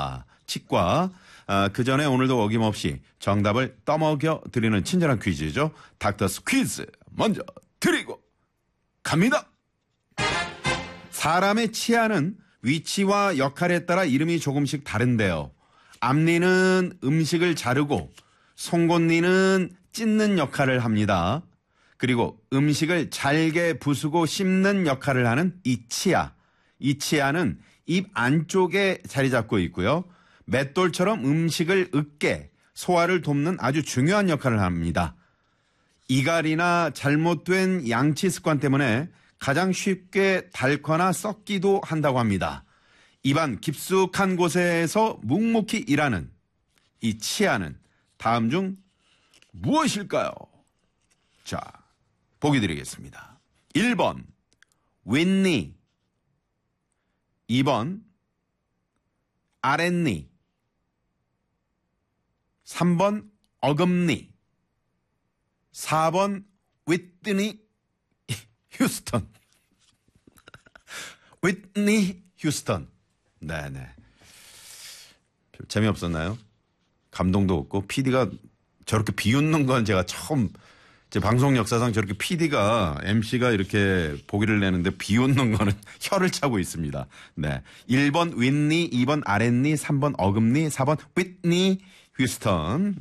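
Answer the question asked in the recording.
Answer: 3번: 어금니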